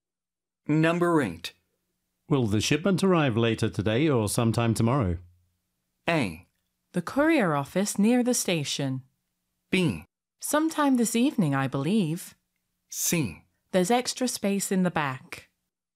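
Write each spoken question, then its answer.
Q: Will the shipment arrive later today or sometime tomorrow?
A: B: Sometime this evening, I believe.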